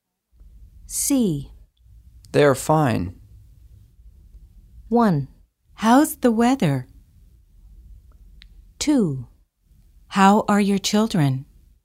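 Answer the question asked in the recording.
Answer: 2: How are your children?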